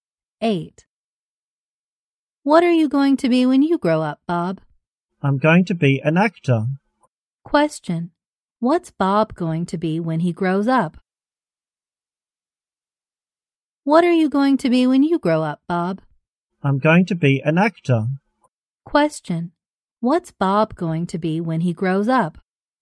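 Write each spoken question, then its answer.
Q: Question. What's Bob going to be when he grows up?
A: An actor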